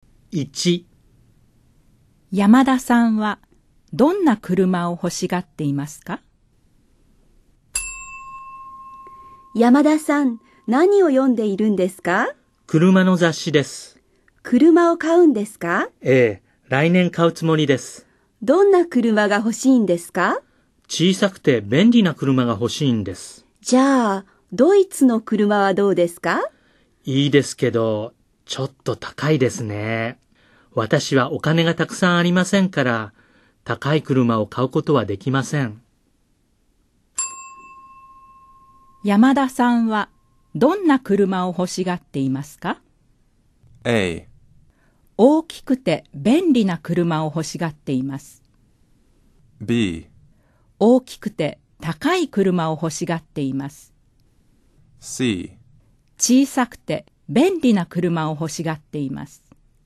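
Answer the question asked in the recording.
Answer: C: 小さくて便利な車を欲しがっています。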